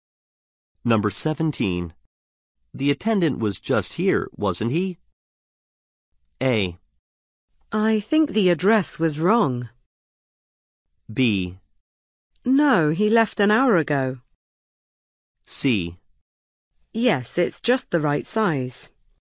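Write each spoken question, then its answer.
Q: The attendant was just here, wasn't he?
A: B: No, he left an hour ago.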